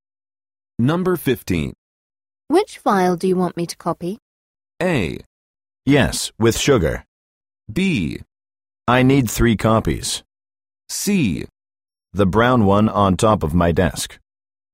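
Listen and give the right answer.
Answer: C: The brown one on top of my desk.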